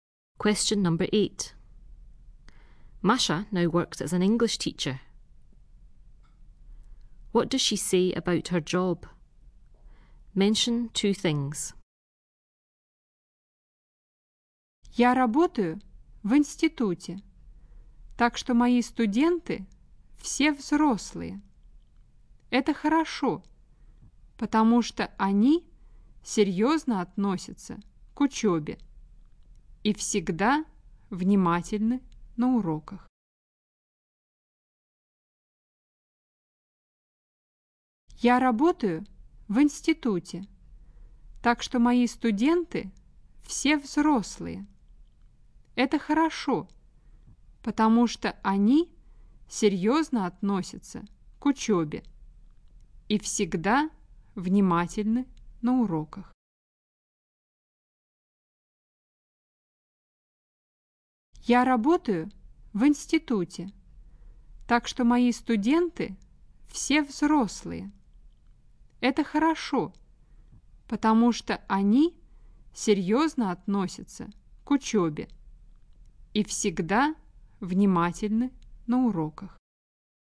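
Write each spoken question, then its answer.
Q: What does she say about her job?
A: She works in an institute, so all her students are adults; they take their studies seriously and are always attentive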